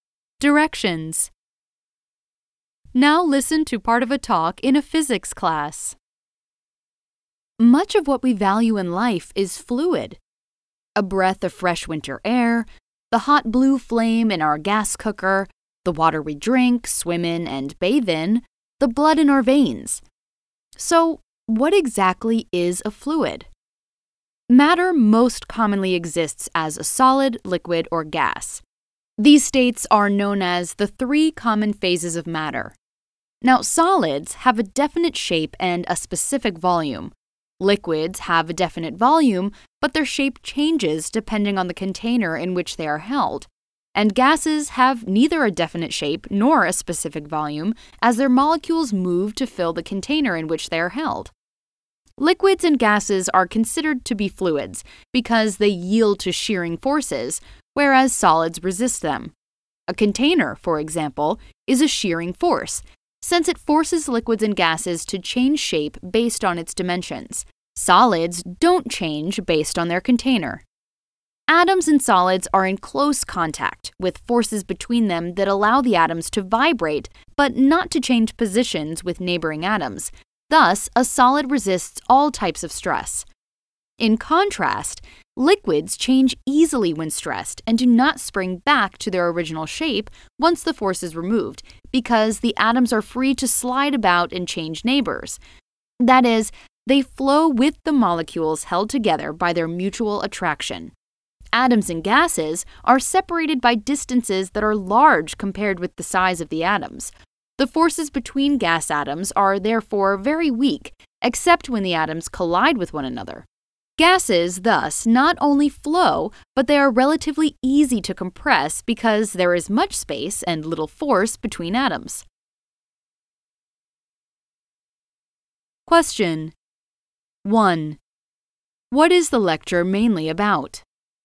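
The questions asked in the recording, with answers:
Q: What is the lecture mainly about?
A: What fluids are and how solids, liquids, and gases differ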